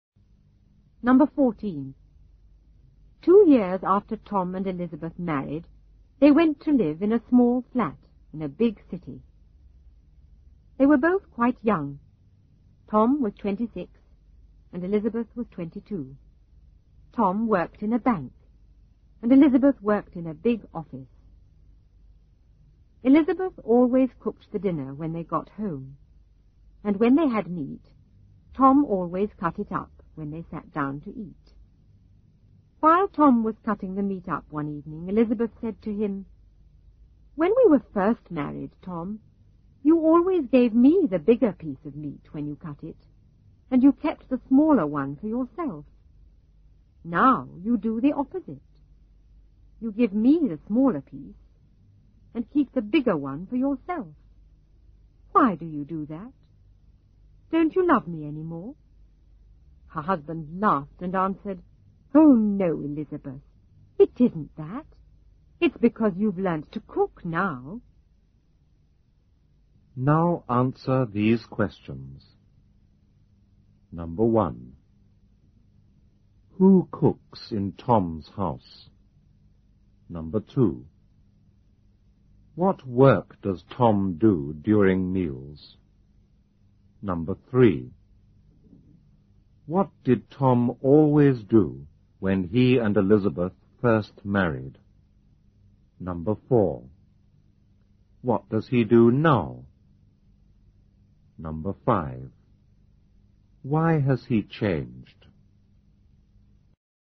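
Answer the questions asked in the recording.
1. Elizabeth
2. He cuts up the meat
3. He gave Elizabeth the bigger piece of meat and kept the smaller one
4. He gives her the smaller piece and keeps the bigger one
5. Because Elizabeth has learnt to cook now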